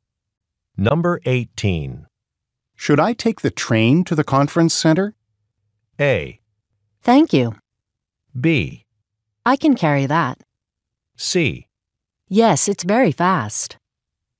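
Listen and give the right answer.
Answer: C: Yes, it's very fast.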